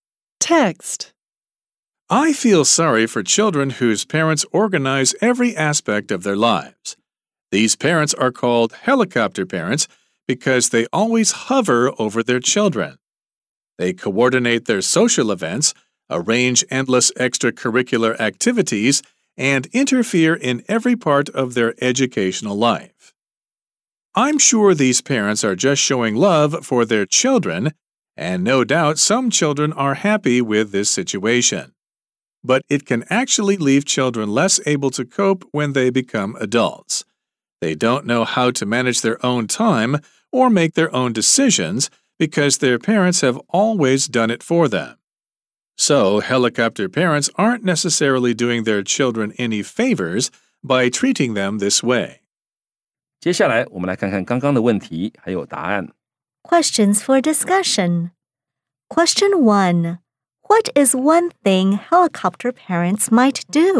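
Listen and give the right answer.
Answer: Coordinate their children's social events, arrange endless extracurricular activities, or interfere in their educational life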